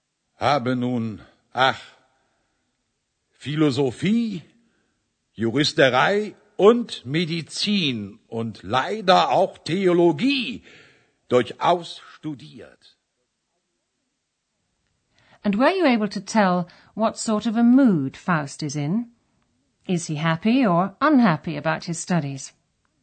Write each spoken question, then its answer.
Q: Is he happy or unhappy about his studies?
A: shows he's unhappy